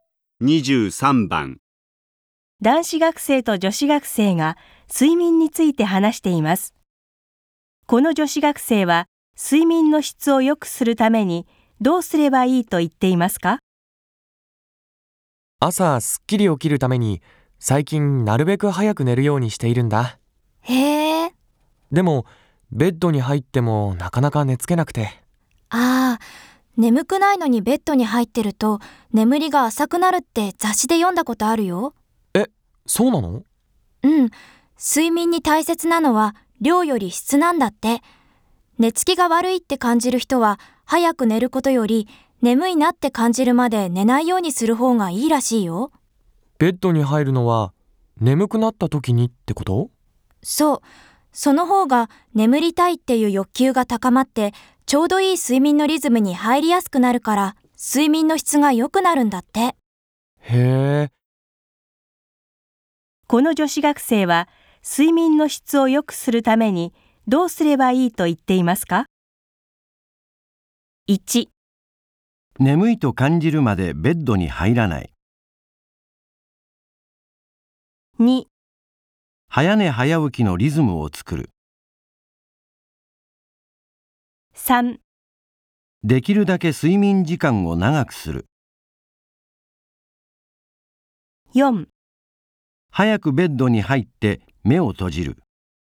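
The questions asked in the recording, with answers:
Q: この女子学生は睡眠の質を良くするためにどうすればいいと言っていますか?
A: 1: 眠いと感じるまでベッドに入らない。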